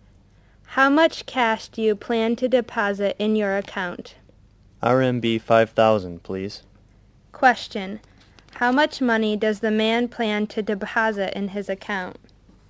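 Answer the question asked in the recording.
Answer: RMB 5,000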